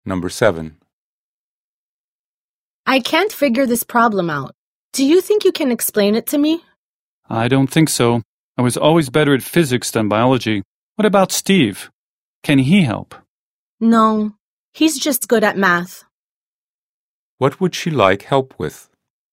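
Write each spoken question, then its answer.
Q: What would she like help with?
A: A biology problem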